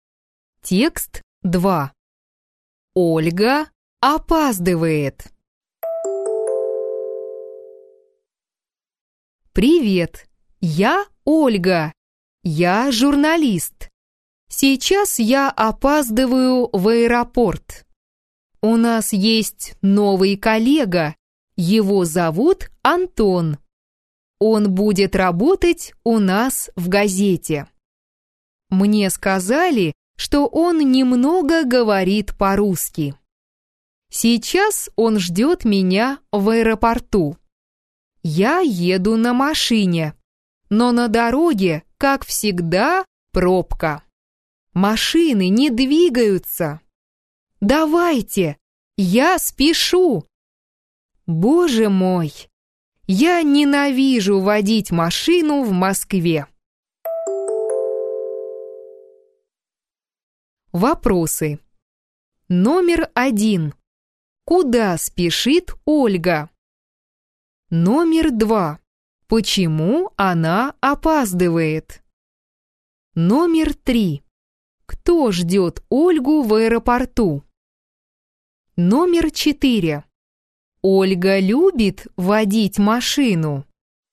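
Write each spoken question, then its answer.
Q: Куда спешит Ольга?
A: В аэропорт

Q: Почему она опаздывает?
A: На дороге пробка

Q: Кто ждет Ольгу в аэропорту?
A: Новый коллега Антон

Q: Ольга любит водить машину.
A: Нет, она ненавидит водить машину в Москве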